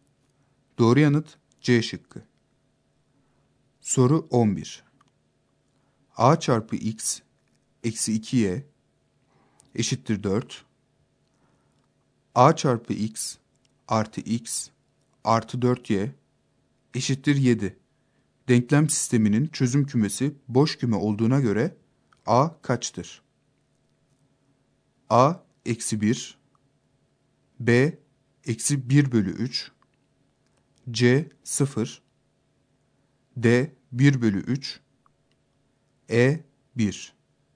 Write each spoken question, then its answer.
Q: Denklem sisteminin çözüm kümesi boş küme olduğuna göre A kaçtır?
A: Doğru yanıt B şıkkı.